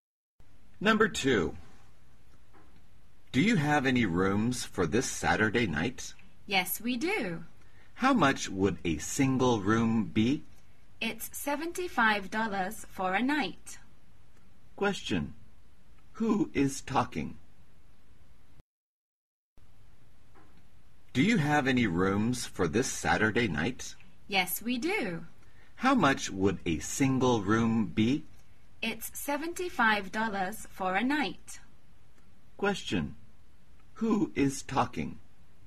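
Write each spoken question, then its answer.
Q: Who is talking?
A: A hotel clerk and a guest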